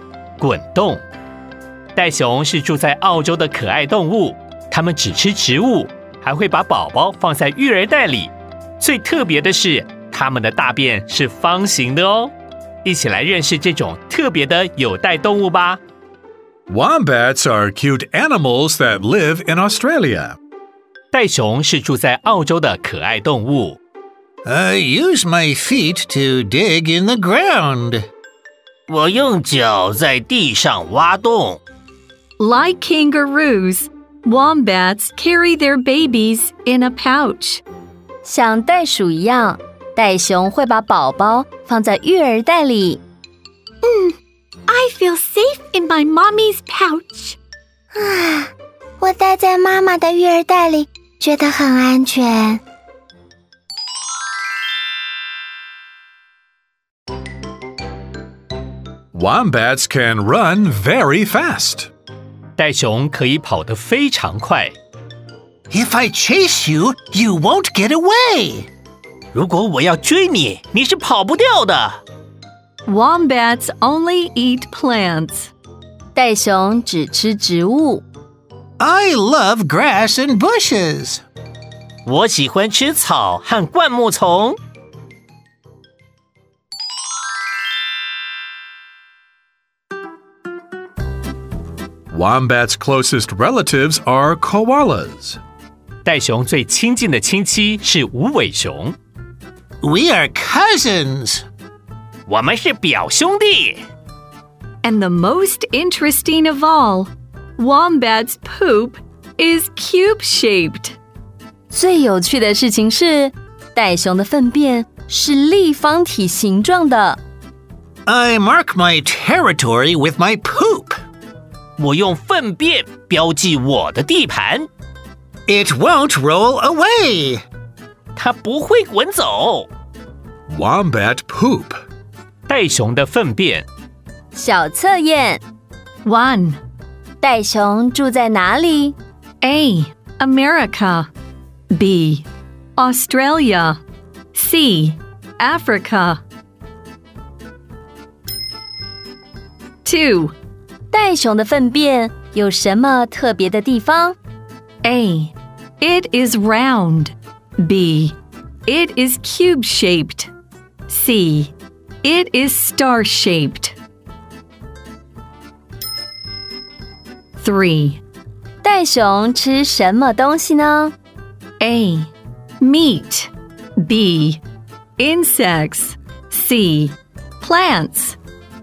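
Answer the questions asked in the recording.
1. B: Australia.
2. B: It is cube-shaped.
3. C: Plants.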